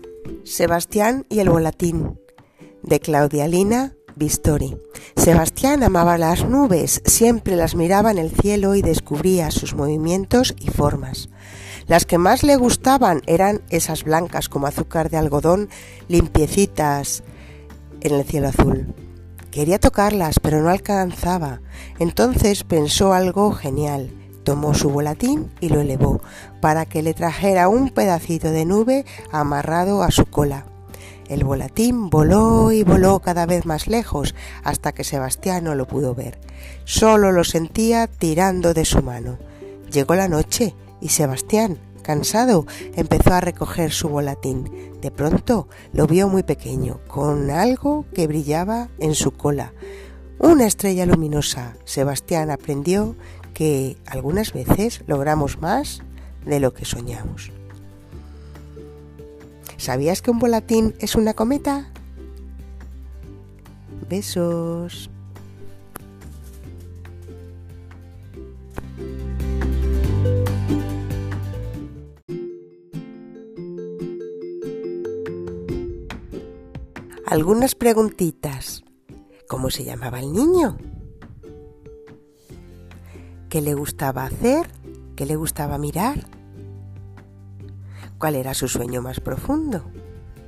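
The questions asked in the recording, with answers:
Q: ¿Cómo se llamaba el niño?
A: Sebastián

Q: ¿Qué le gustaba mirar?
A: Las nubes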